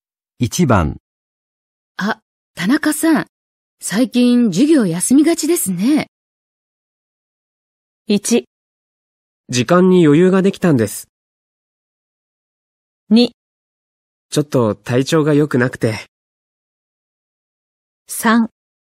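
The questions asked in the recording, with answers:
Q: あ、田中さん、最近授業休みがちですね。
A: 2: ちょっと体調が良くなくて。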